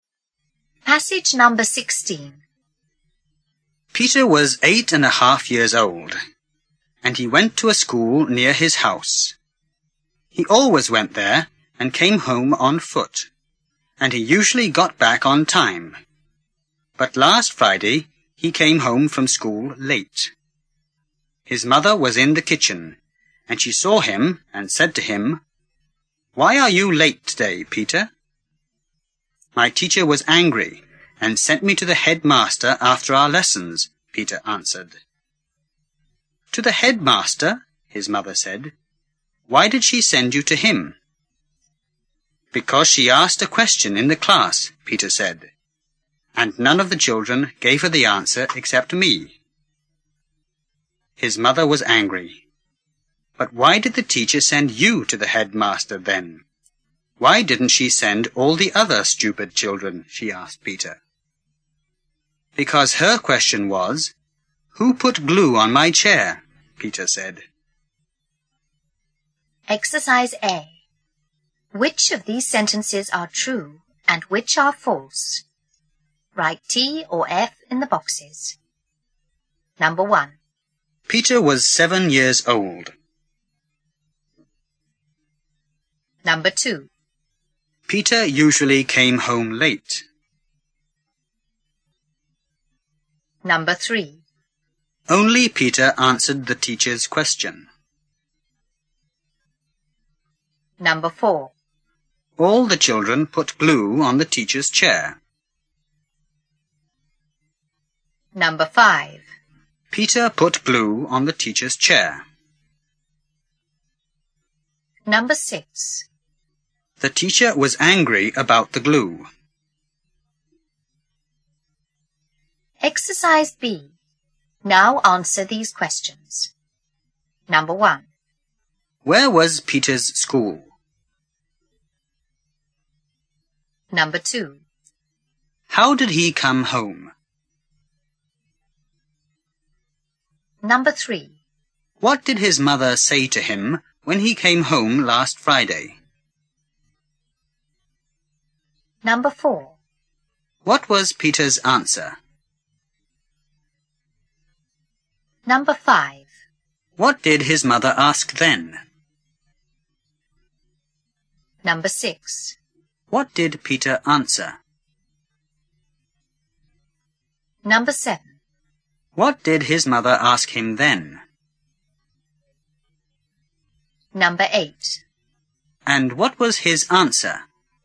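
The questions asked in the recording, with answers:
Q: Where was Peter's school?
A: Near his house

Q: How did he come home?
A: On foot

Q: What did his mother say to him when he came home last Friday?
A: Why are you late today, Peter?

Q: What was Peter's answer?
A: His teacher was angry and sent him to the headmaster after the lessons

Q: What did his mother ask then?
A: Why did she send you to him?

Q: What did Peter answer?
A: Because the teacher asked a question and none of the children answered except him

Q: What did his mother ask him then?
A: Why didn't she send all the other stupid children?

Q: And what was his answer?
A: Because her question was 'Who put glue on my chair?'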